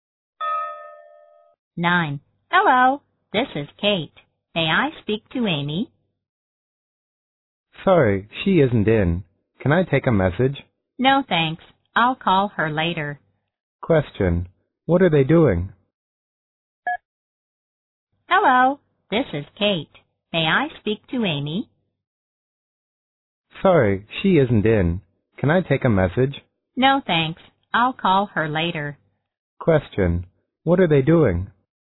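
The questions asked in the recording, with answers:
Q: What are they doing?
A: Talking on the phone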